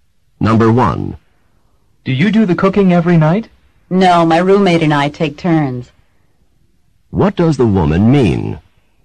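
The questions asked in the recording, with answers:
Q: What does the woman mean?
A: She and her roommate take turns cooking.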